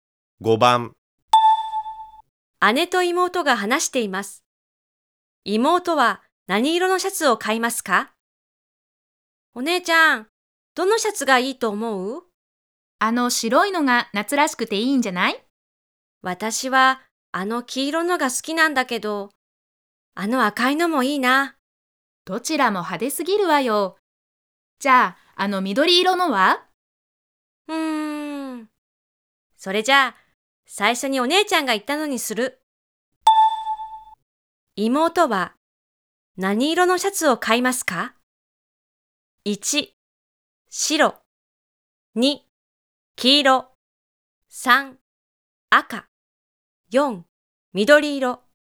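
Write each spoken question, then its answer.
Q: 妹は何色のシャツを買いますか?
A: 1: 白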